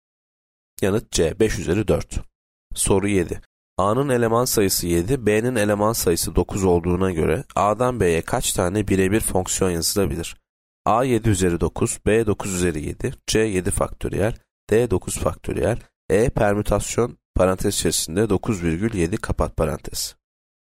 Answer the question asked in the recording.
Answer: Yanıt E permütasyon parantez içerisinde 9,7 kapat parantez.